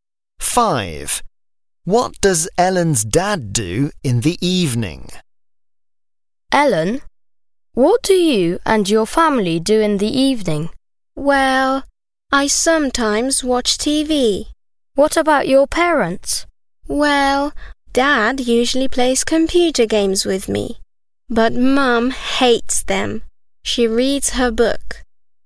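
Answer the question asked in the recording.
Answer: He plays computer games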